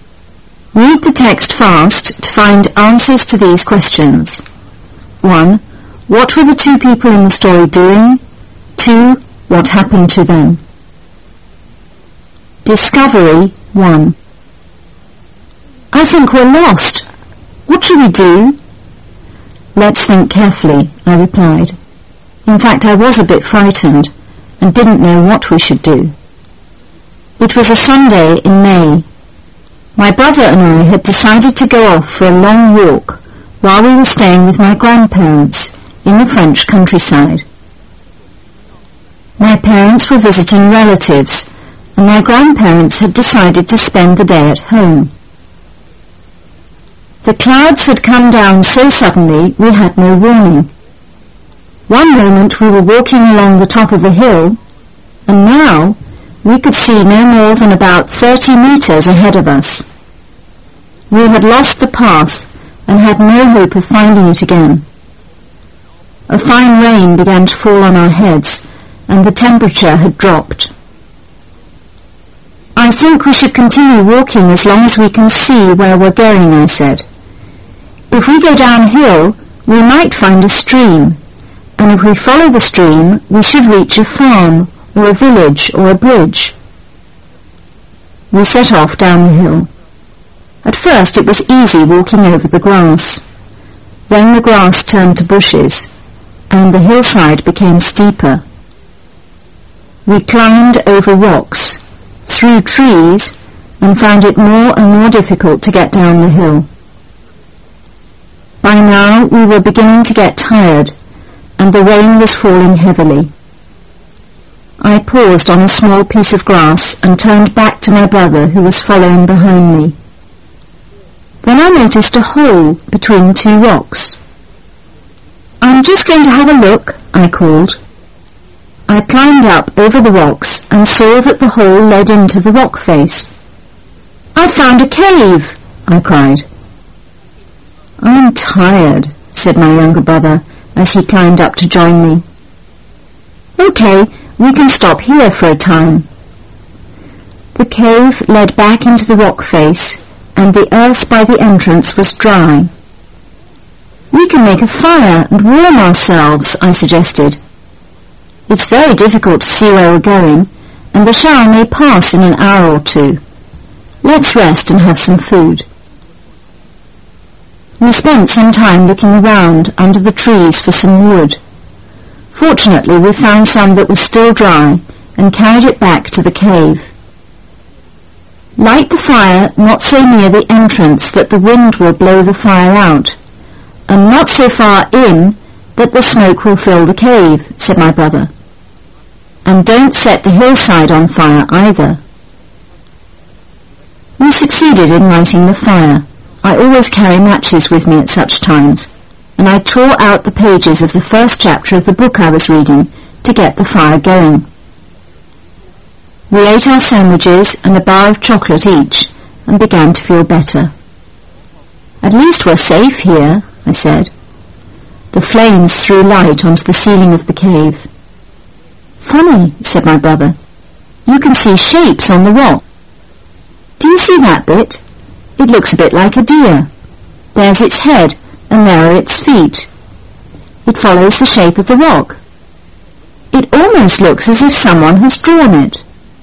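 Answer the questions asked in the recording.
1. Going for a long walk in the French countryside
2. They got lost in the clouds and rain and found a cave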